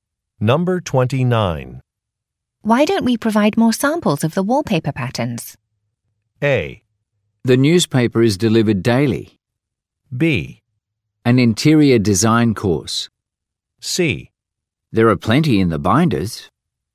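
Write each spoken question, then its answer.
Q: Why don't we provide more samples of the wallpaper patterns?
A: C: There are plenty in the binders.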